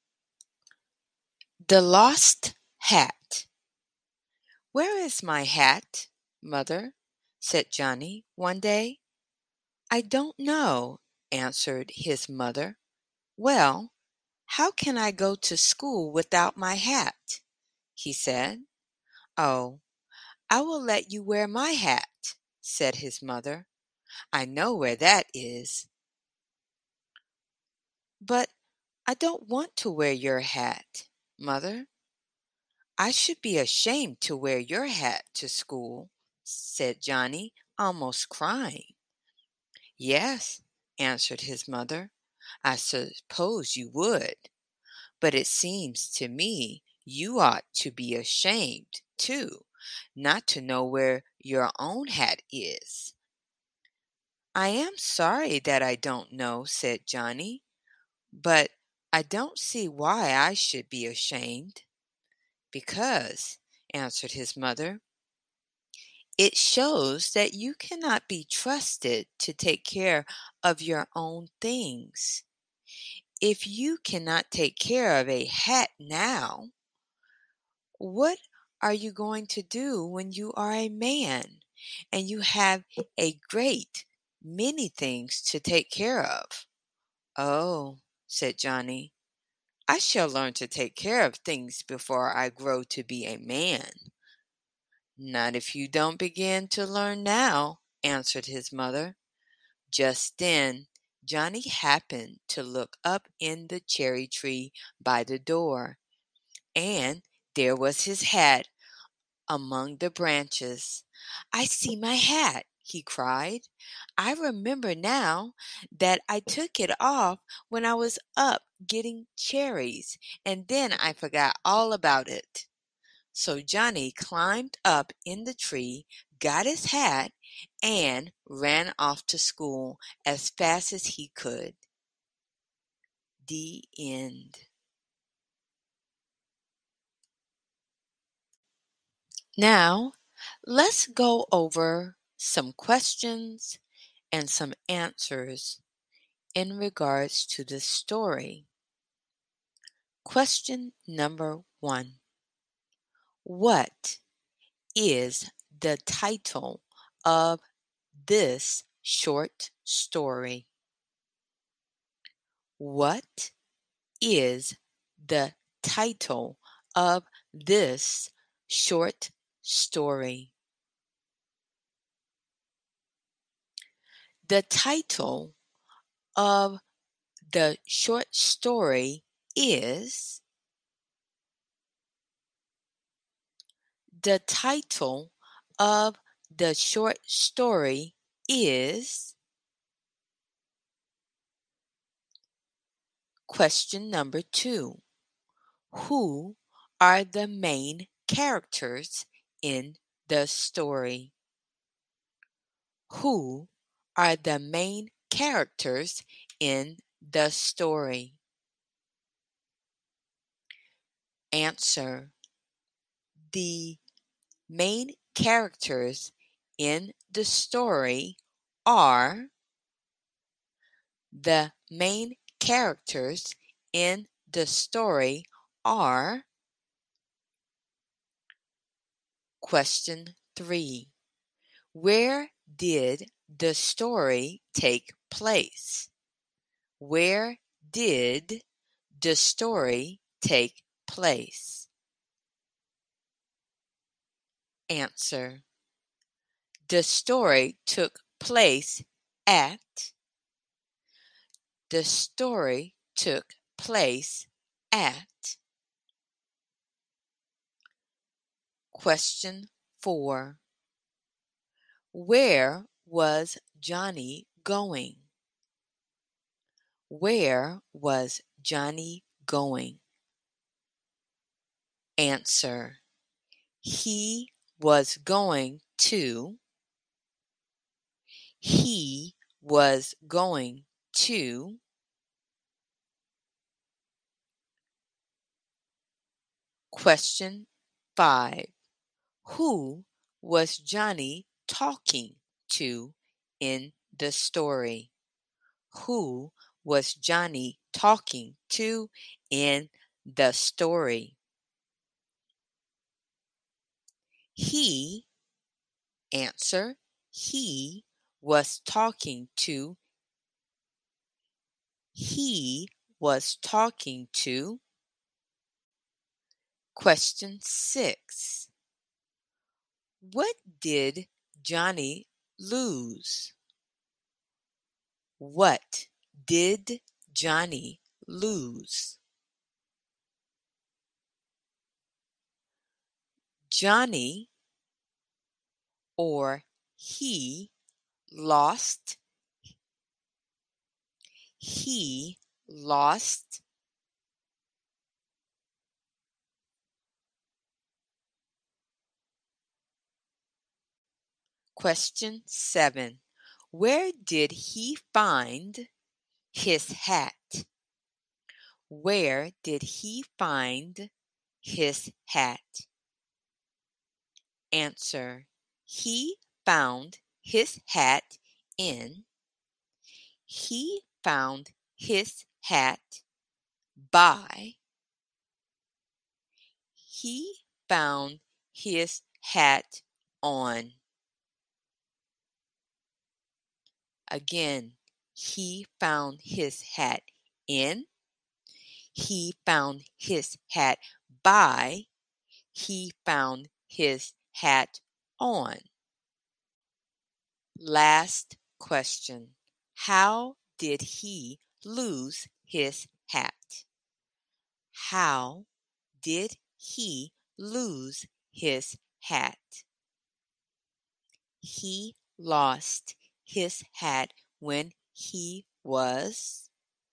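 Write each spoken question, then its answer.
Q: What is the title of this short story?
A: The Lost Hat

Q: Who are the main characters in the story?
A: Johnny and his mother

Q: Where was Johnny going?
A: To school

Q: Who was Johnny talking to in the story?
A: His mother

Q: What did Johnny lose?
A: His hat

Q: Where did he find his hat?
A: In the cherry tree by the door

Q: How did he lose his hat?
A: He took it off while up in the tree getting cherries and forgot it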